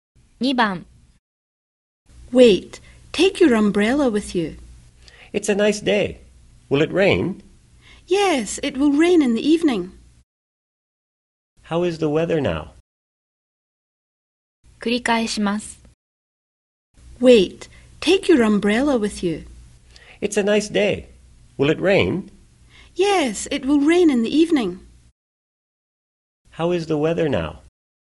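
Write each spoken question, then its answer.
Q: How is the weather now?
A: It is nice (sunny)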